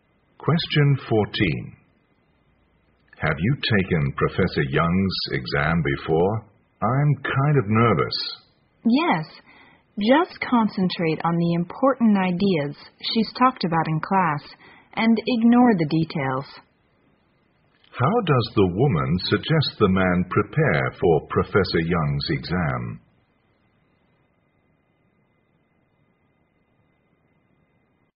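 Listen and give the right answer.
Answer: Concentrate on the important ideas from class and ignore the details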